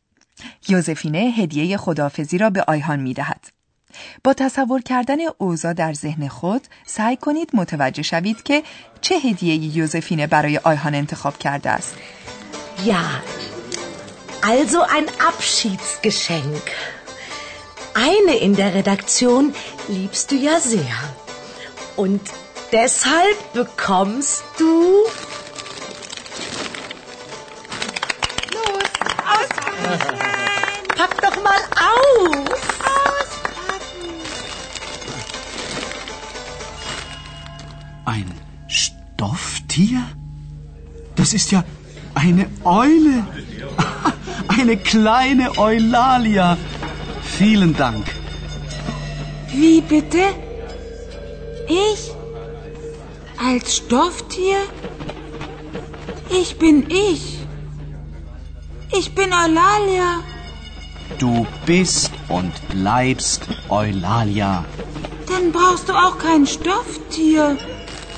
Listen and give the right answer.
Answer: هدیه‌ای که یوزفینه برای آیهان انتخاب کرده است، عروسک پارچه‌ای یک جغد است.